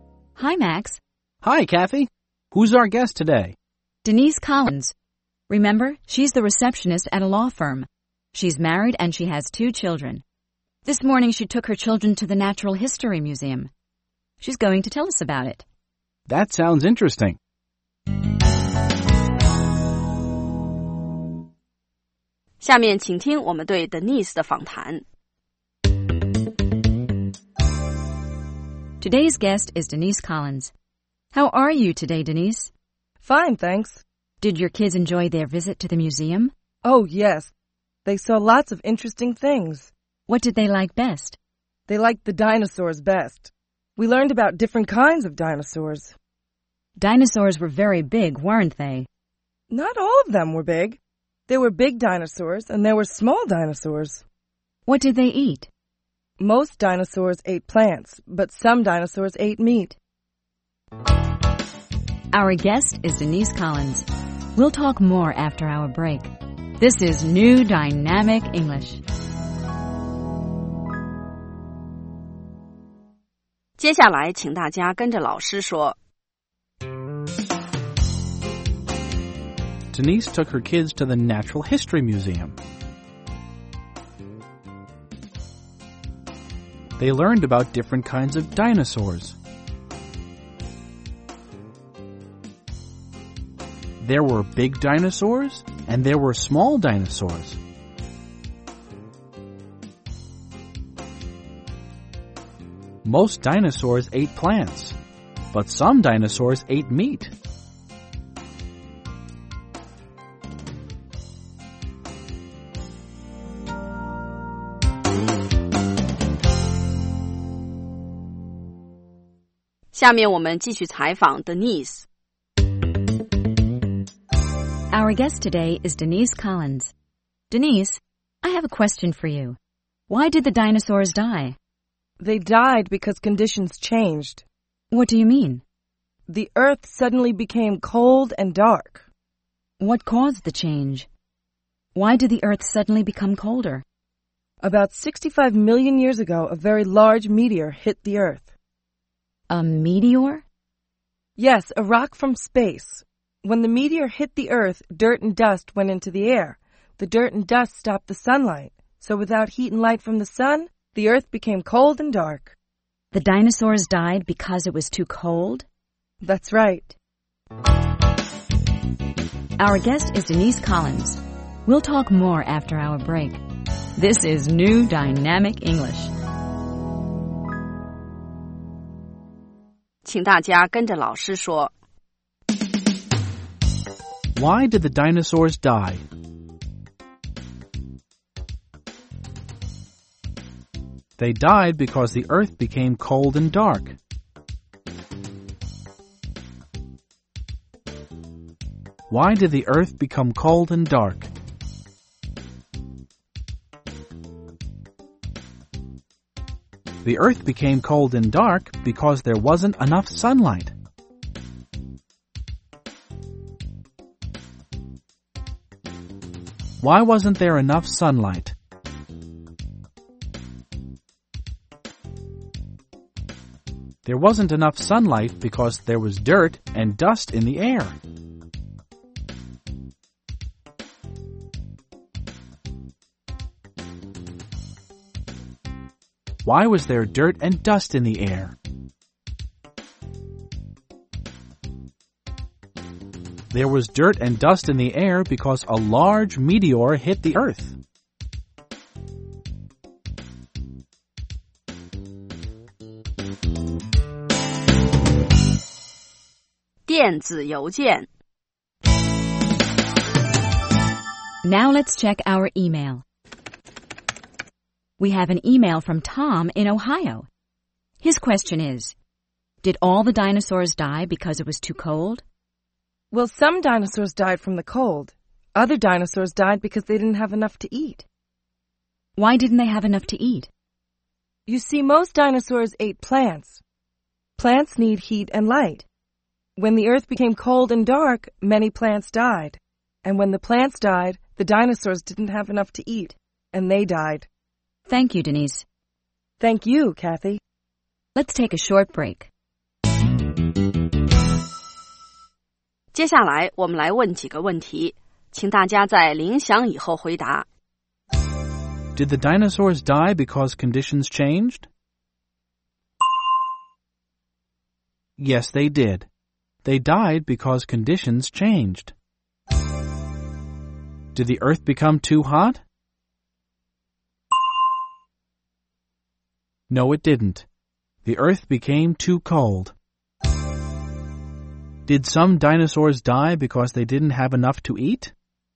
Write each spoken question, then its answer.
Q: Did the dinosaurs die because conditions changed?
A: Yes, they did. They died because conditions changed.

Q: Did some dinosaurs die because they didn't have enough to eat?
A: Yes, they did. Some dinosaurs didn't have enough plants to eat, so they died.